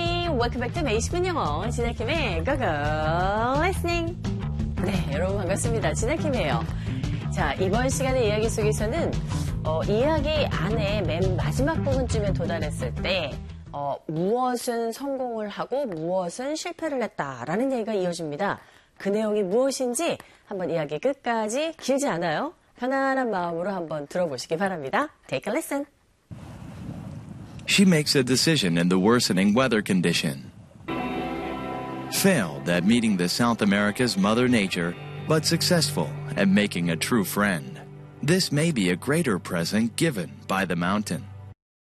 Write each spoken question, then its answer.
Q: 이야기 안에 맨 마지막 부분쯤에 도달했을 때 무엇은 성공을 하고 무엇은 실패를 했다라는 얘기가 이어집니다. 그 내용이 무엇인지 한번 이야기 끝까지 길지 않아요.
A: 진정한 친구를 사귄 것에는 성공을 했는데 이 대자연의 만남은 실패를 했다